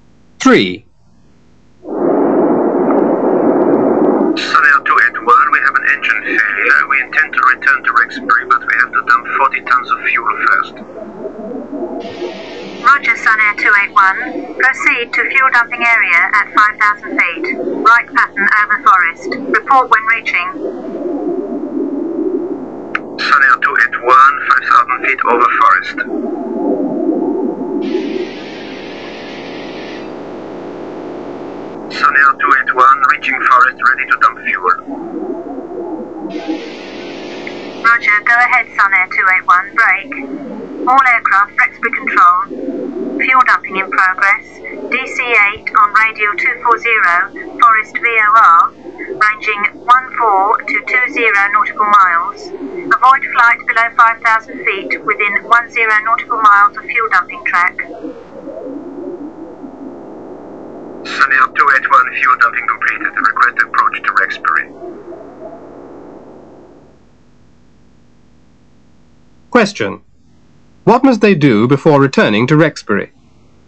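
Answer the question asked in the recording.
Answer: Dump 40 tons of fuel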